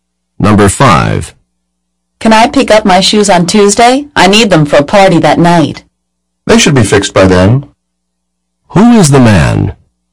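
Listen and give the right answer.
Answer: A shoe repairman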